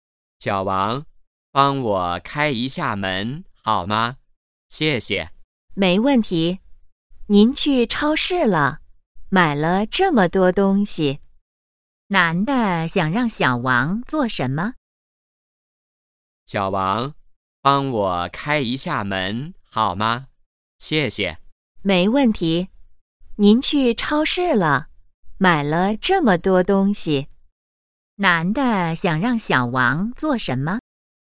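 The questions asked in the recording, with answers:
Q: 男的想让小王做什么?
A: 开门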